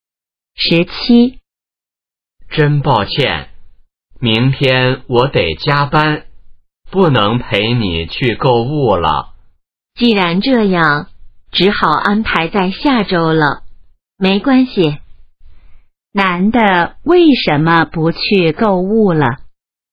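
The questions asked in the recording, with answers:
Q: 男的为什么不去购物了?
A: 明天得加班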